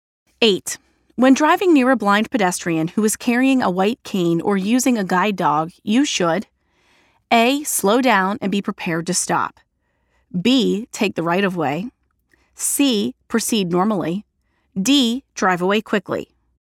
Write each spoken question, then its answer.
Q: When driving near a blind pedestrian who is carrying a white cane or using a guide dog, you should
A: The answer is letter A.